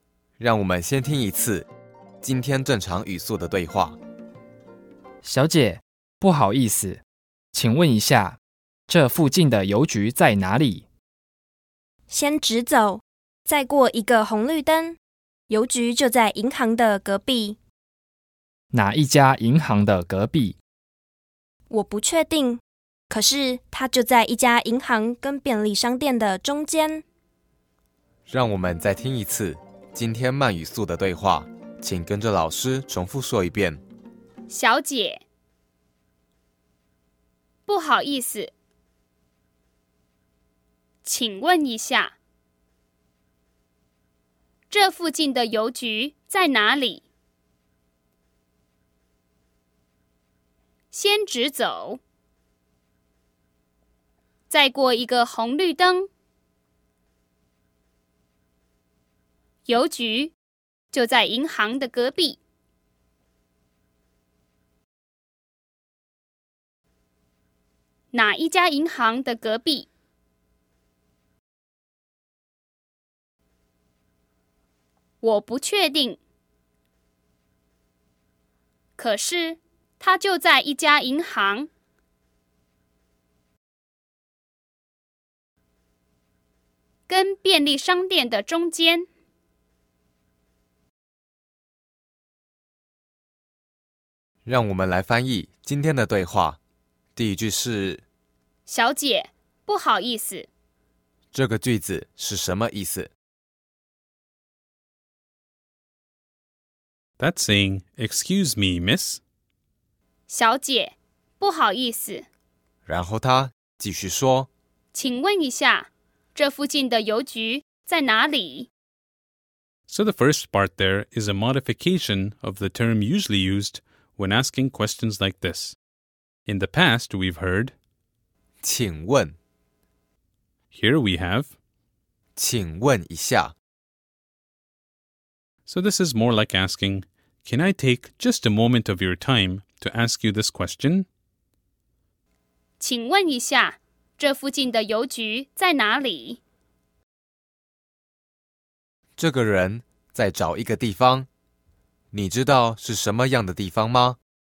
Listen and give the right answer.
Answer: 这个地方叫邮局,